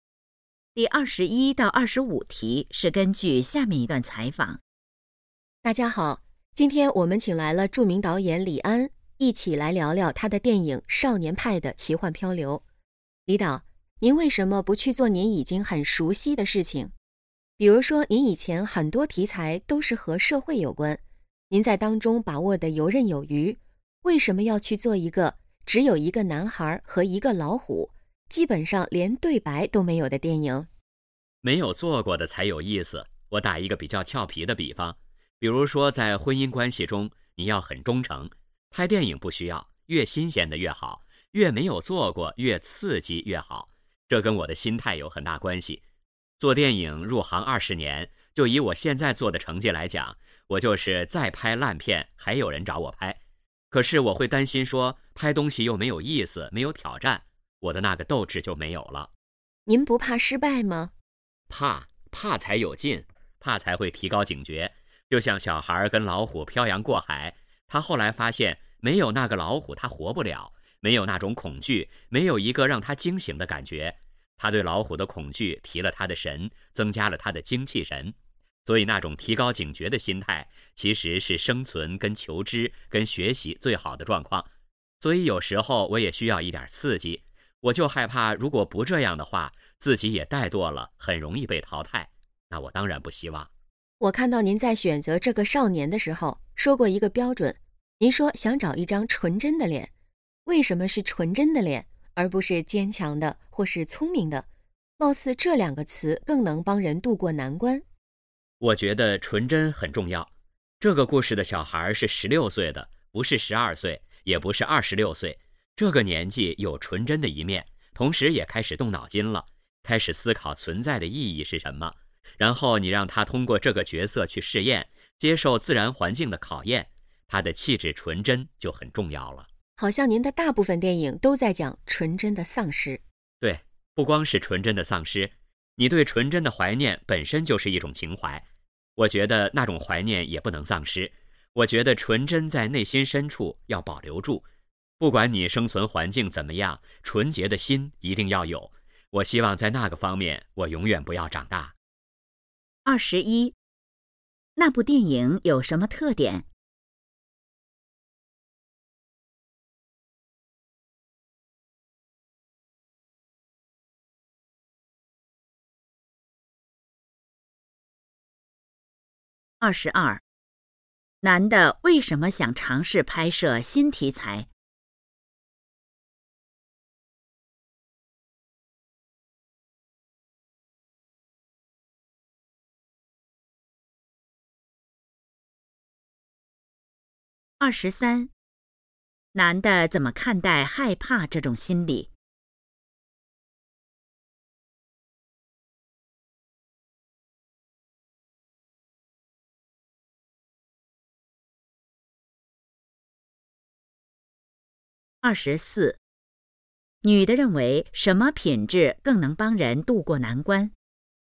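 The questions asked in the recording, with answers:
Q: 那部电影有什么特点?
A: 只有一个男孩和一只老虎,基本没有对白

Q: 男的为什么想尝试拍摄新题材?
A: 没做过的才有意思,有挑战

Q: 男的怎么看待害怕这种心理?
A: 害怕能提高警觉,增加精气神

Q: 女的认为什么品质更能帮人渡过难关?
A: 坚强或聪明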